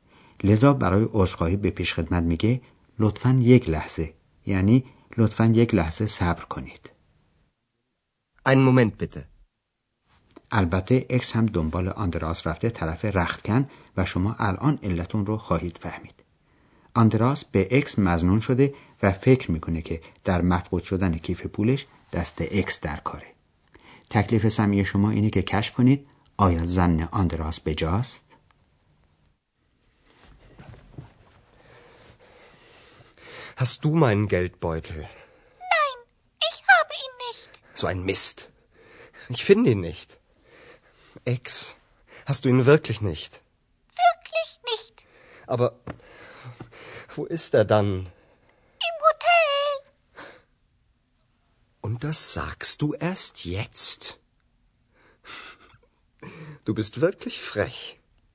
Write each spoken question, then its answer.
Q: آیا زن آندراس بجاست؟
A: درسته که اکس کیف پول آندراس رو بر نداشته ولی دیده بود که آندراس کیف پولش رو در هتل جا گذاشته بود